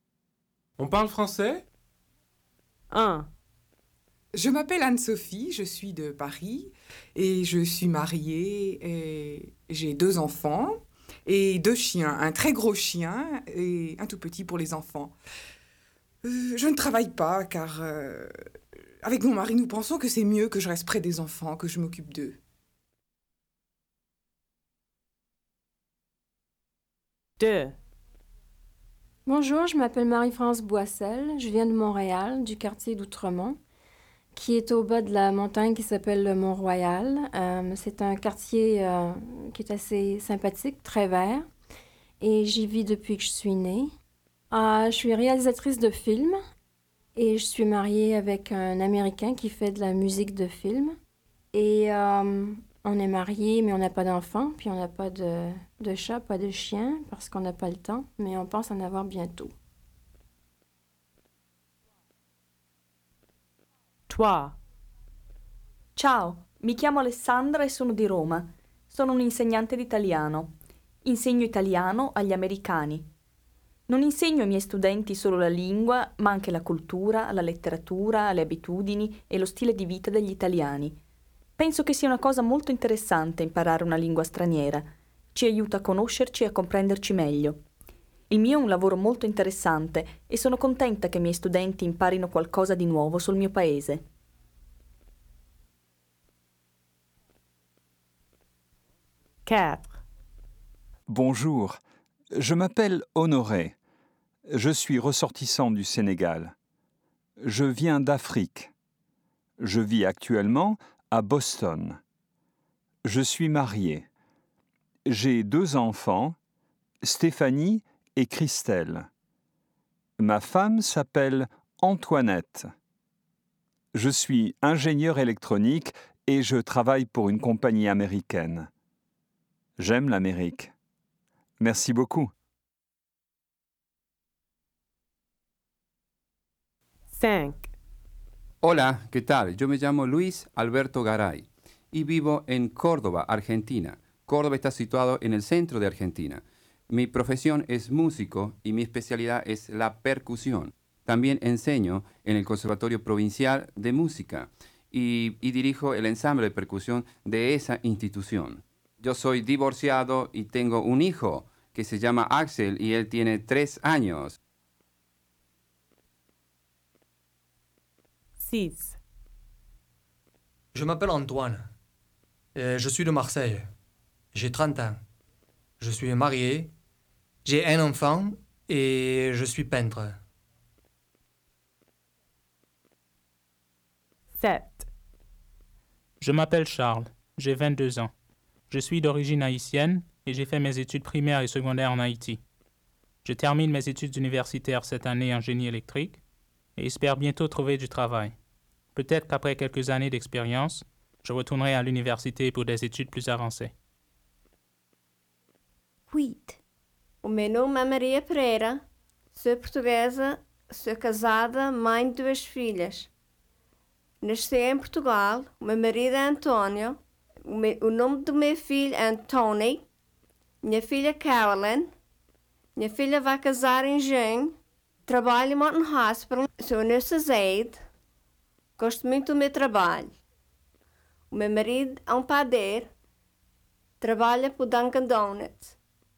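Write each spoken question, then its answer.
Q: On parle français?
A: oui

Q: On parle français?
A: oui

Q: On parle français?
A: non

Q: On parle français?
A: oui

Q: On parle français?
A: non

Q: On parle français?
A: oui

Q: On parle français?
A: oui

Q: On parle français?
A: non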